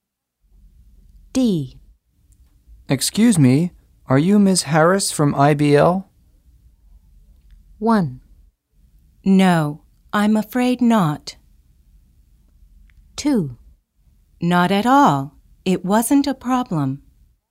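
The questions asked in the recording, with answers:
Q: Excuse me, are you Ms. Harris from IBL?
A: 1: No, I'm afraid not.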